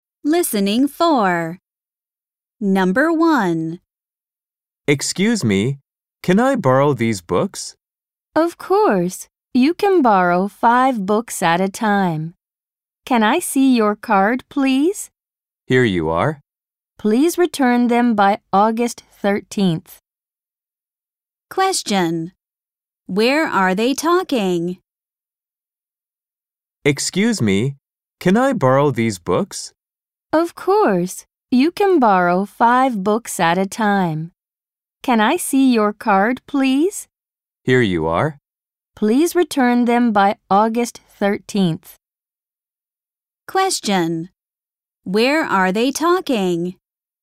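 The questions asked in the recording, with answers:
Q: Where are they talking?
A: At a library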